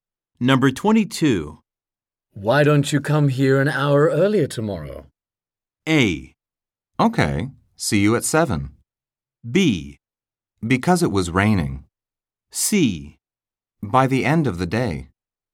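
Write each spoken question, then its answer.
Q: Why don't you come here an hour earlier tomorrow?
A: A: Okay, see you at 7.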